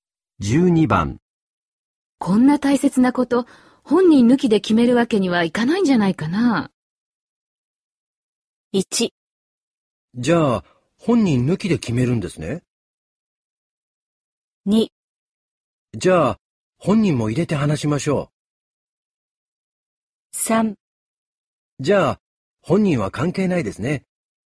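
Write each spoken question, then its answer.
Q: こんな大切なこと、本人抜きで決めるわけにはいかないんじゃないかな。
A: 2: じゃあ、本人も入れて話しましょう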